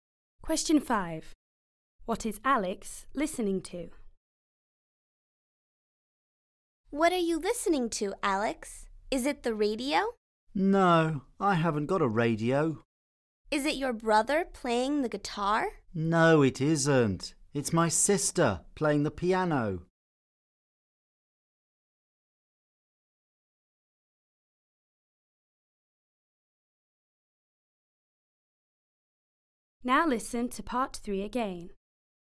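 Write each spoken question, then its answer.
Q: What is Alex listening to?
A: His sister playing the piano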